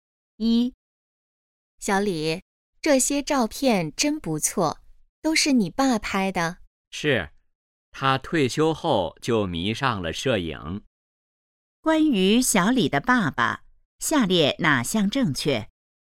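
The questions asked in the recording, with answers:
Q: 关于小李的爸爸,下列哪项正确?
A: 他退休后迷上了摄影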